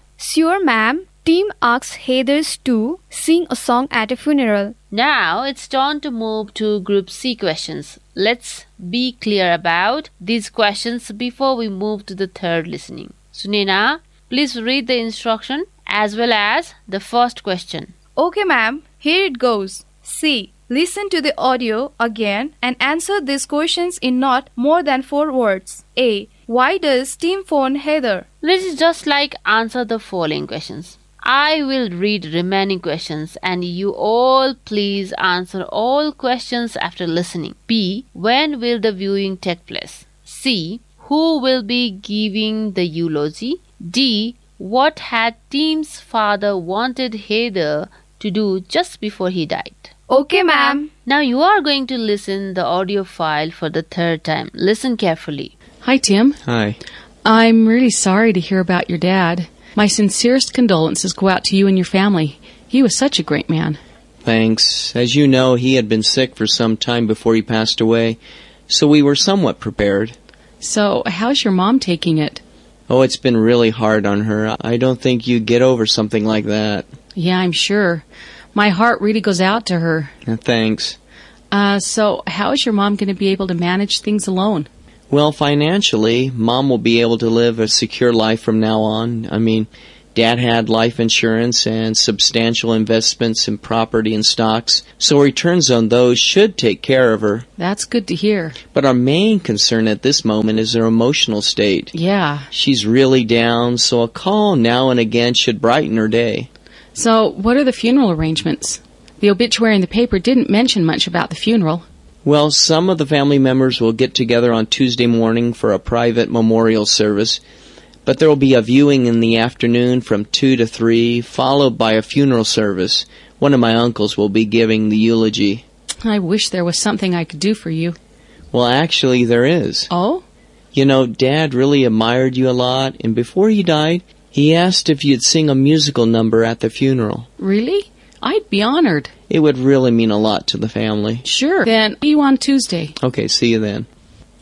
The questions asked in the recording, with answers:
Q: When will the viewing take place?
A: the viewing ceremony is on Tuesday evening.

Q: Who will be giving the eulogy?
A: one of Tim's uncle will be giving eulogy.

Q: What had Tim's father wanted Heather to do just before he died?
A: Tim's father wanted Heathers to sing a song in his funeral.